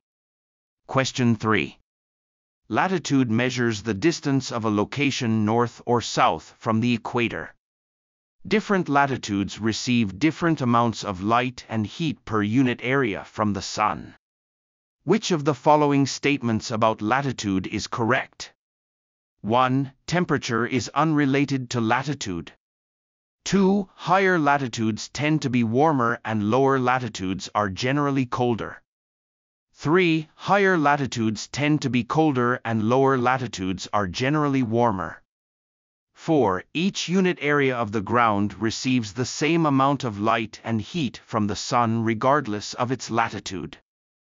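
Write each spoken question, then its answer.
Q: Which of the following statements about latitude is correct?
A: 3: Higher latitudes tend to be colder and lower latitudes are generally warmer.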